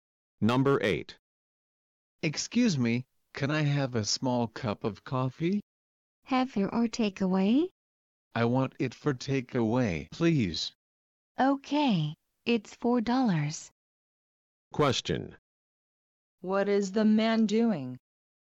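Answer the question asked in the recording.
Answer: Buying (ordering) a small coffee to take away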